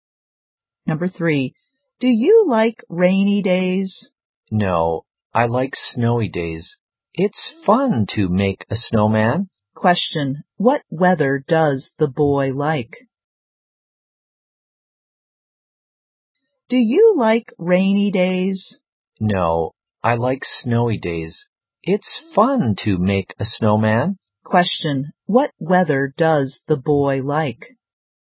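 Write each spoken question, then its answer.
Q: what weather does the boy like?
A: Snowy days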